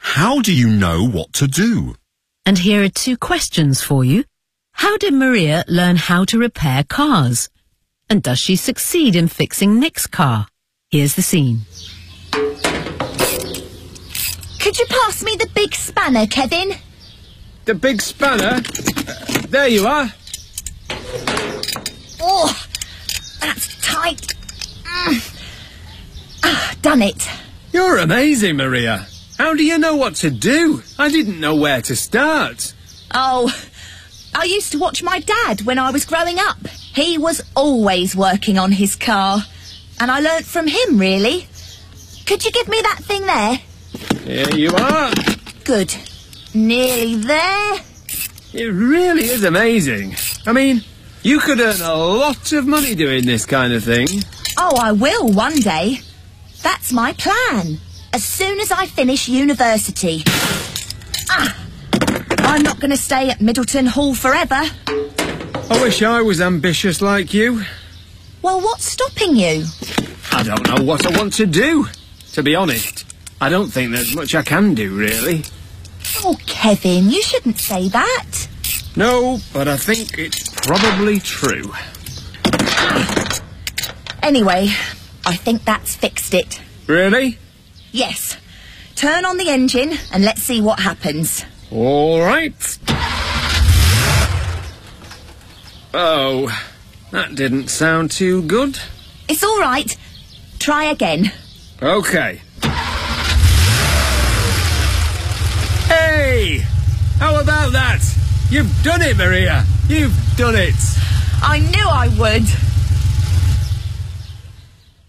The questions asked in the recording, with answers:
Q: How did Maria learn how to repair cars?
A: I used to watch my dad when I was growing up.

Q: And does she succeed in fixing Nick's car?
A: Yes. Kevin turns the engine on and says,